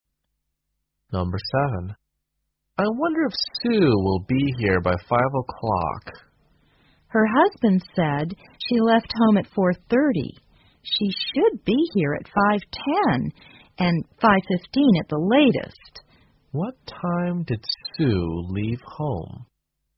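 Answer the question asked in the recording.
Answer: At 4:30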